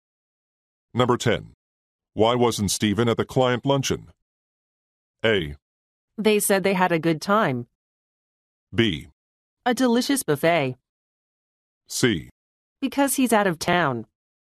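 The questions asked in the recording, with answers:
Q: Why wasn't Stephen at the client luncheon?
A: C: Because he's out of town.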